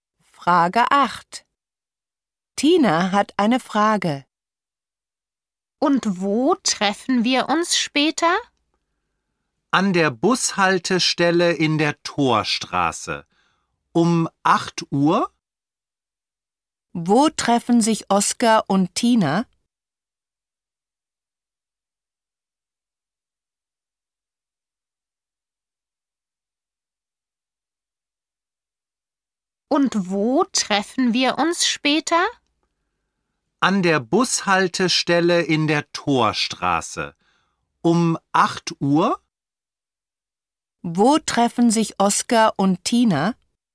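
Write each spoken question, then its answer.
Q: Wo treffen sich Oskar und Tina?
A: An der Bushaltestelle in der Torstraße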